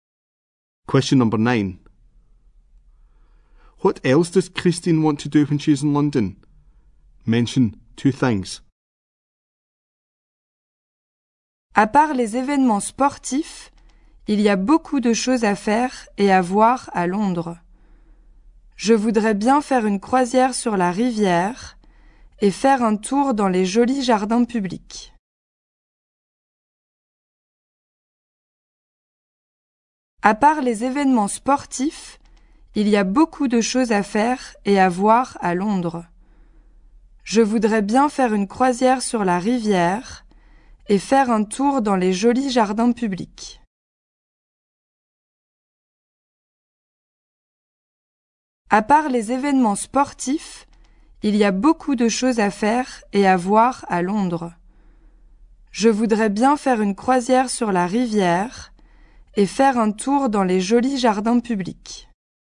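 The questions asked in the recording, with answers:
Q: What else does Christine want to do when she's in London?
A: Go on a river cruise; walk round the pretty public gardens/parks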